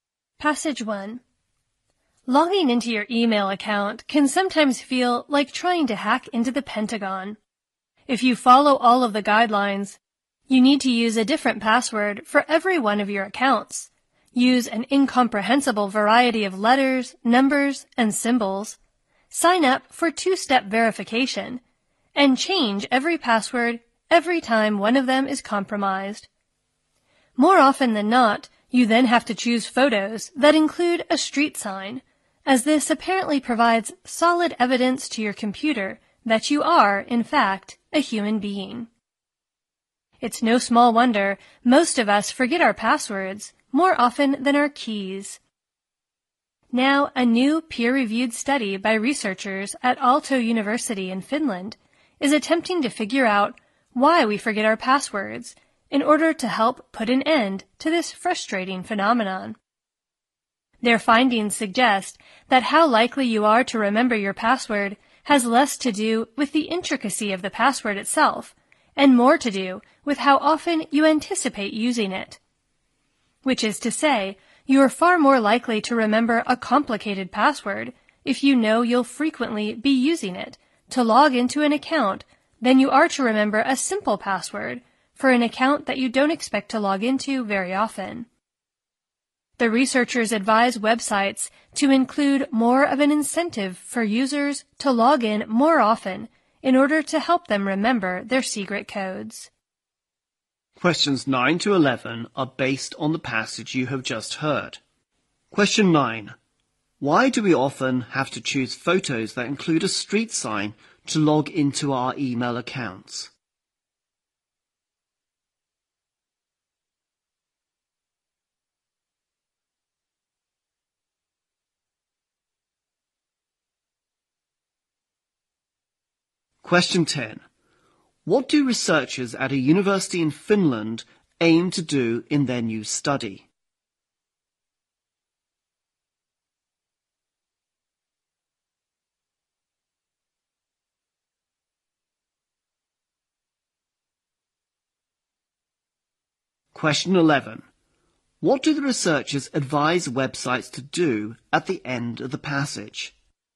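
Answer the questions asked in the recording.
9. To prove to the computer that we are human
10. Figure out why we forget our passwords
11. Give users more incentive to log in more often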